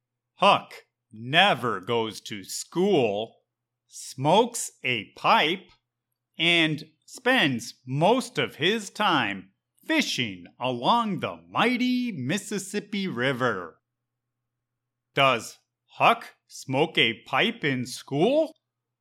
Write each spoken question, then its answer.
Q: Does Huck smoke a pipe in school?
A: No! Huck does not even go to school.